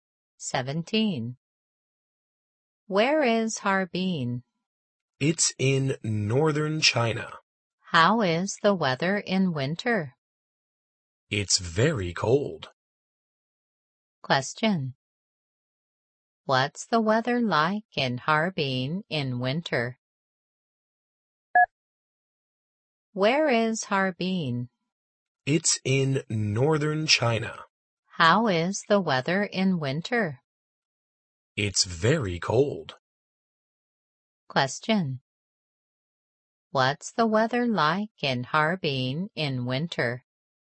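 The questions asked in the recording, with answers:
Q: What's the weather like in Harbin in winter?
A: Very cold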